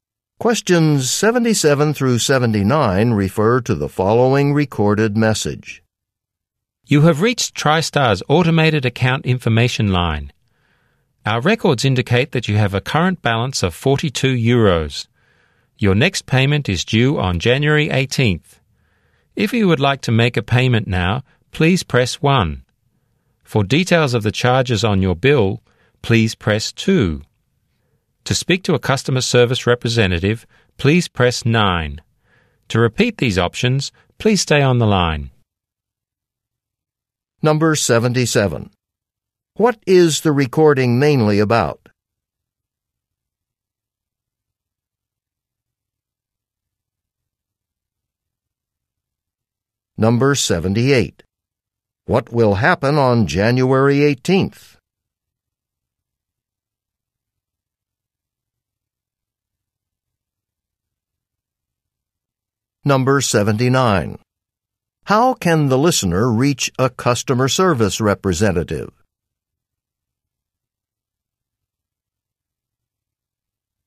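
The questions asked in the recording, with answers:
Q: What is the recording mainly about?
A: Account information

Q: What will happen on January 18th?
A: A payment is due

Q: How can the listener reach a customer service representative?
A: By pressing 9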